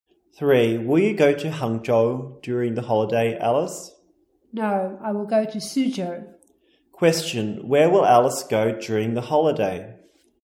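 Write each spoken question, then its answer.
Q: Question, where will Alice go during the holiday?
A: Suzhou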